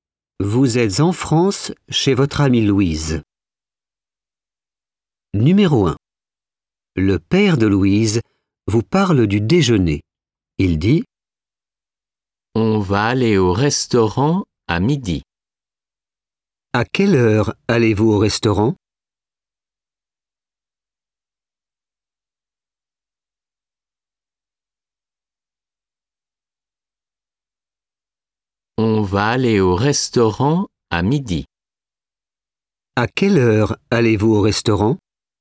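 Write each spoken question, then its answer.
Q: À quelle heure allez-vous au restaurant?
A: à midi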